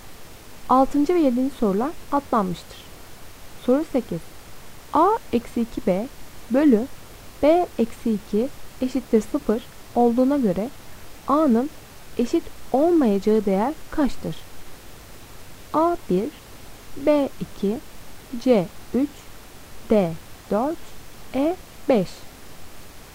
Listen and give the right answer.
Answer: Doğru cevap D 4.